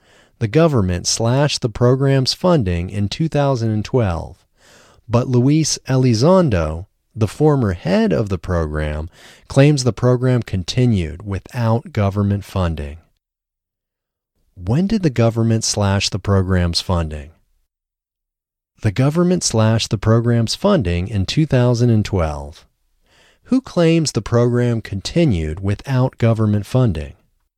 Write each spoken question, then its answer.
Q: When did the government slash the program's funding?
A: The government slashed the program's funding in 2012.

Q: Who claims the program continued without government funding?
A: Luis Elizondo, the former head of the program, claims the program continued without government funding.